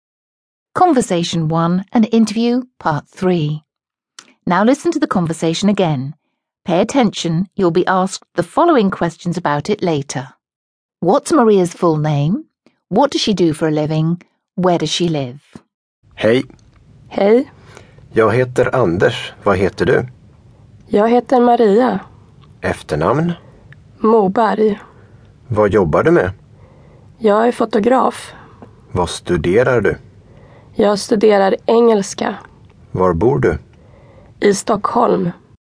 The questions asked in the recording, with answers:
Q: What's Maria's full name?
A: I hope you said Maria Moberg, because that's the right answer.

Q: What does she do for a living?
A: Did you say she's a photographer?

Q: Where does she live?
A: The answer is Stockholm.